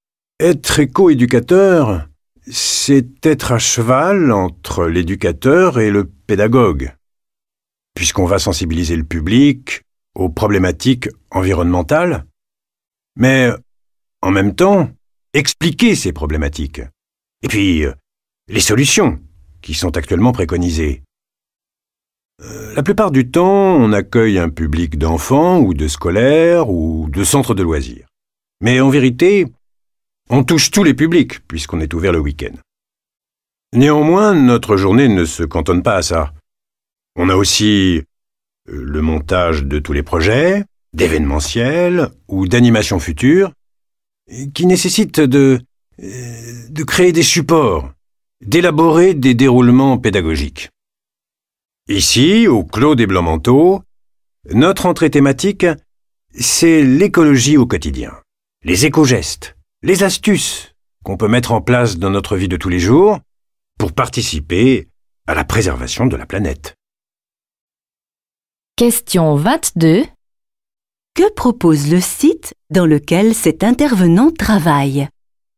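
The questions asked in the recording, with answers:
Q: Que propose le site dans lequel cet intervenant travaille ?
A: Une sensibilisation à l'écologie au quotidien : les éco-gestes et astuces pour préserver la planète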